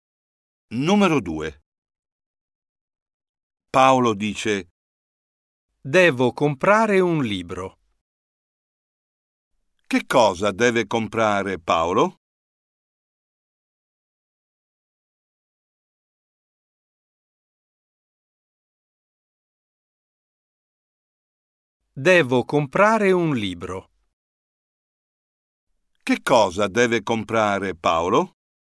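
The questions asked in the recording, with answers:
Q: Che cosa deve comprare Paolo?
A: un libro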